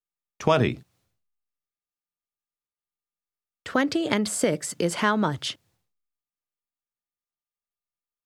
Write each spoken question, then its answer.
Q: 20 and 6 is how much?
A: 26.